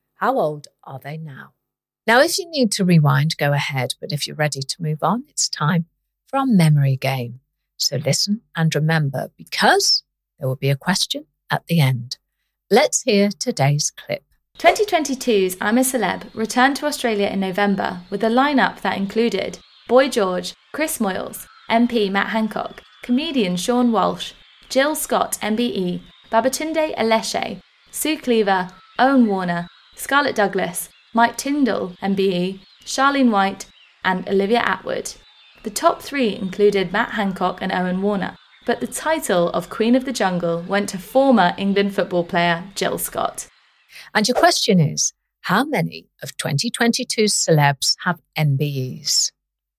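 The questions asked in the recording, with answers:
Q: how many of 2022's celebs have MBEs?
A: Two (Jill Scott and Mike Tyndall)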